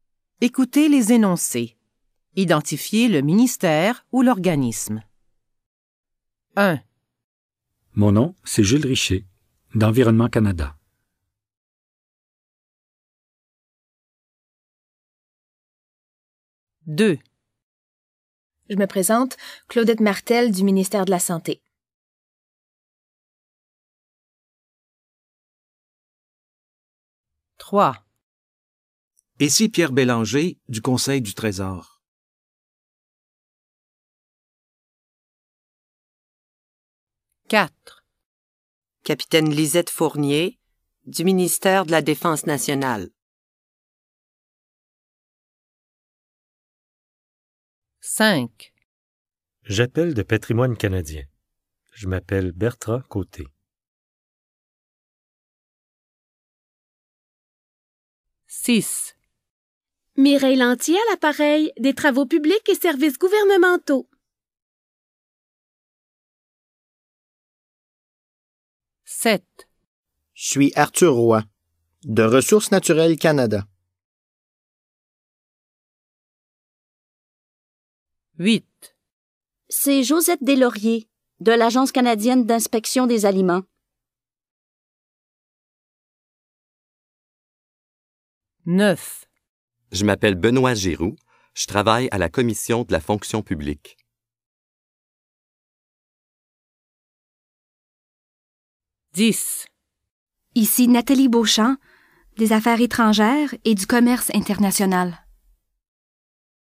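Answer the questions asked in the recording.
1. Environnement Canada
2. ministère de la Santé
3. Conseil du Trésor
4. ministère de la Défense nationale
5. Patrimoine canadien
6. Travaux publics et Services gouvernementaux
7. Ressources naturelles Canada
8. Agence canadienne d'inspection des aliments
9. Commission de la fonction publique
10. Affaires étrangères et Commerce international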